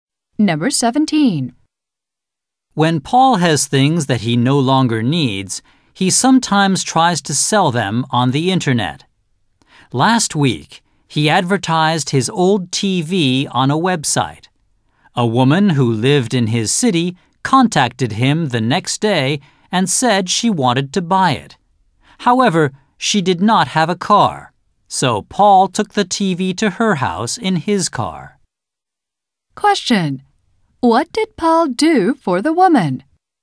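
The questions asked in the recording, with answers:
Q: What did Paul do for the woman?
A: He took the TV to her house in his car.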